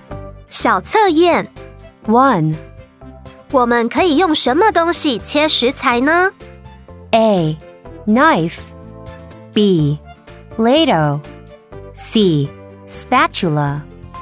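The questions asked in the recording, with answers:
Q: 我们可以用什么东西切食材呢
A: A: Knife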